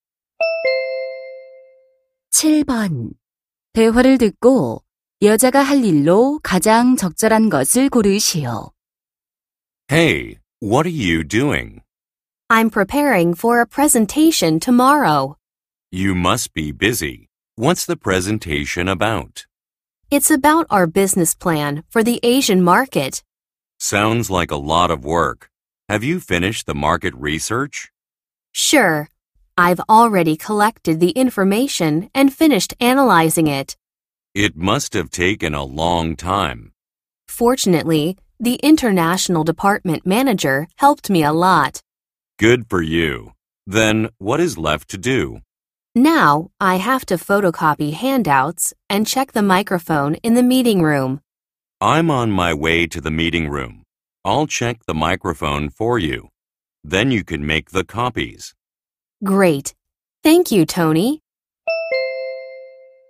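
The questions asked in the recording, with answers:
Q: 대화를 듣고 여자가 할 일로 가장 적절한 것을 고르시오.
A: 유인물 복사하기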